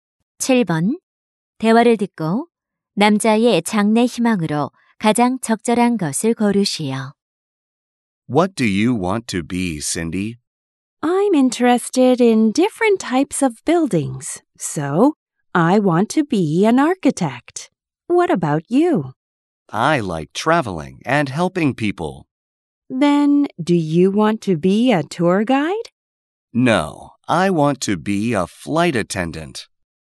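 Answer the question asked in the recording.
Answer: 승무원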